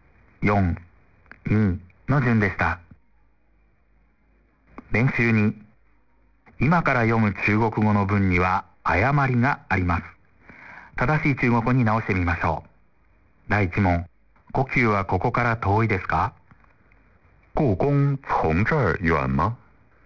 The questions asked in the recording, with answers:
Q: 正しい中国語に直してみましょう。第1問、呼吸はここから遠いですか?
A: 故宫离这儿远吗?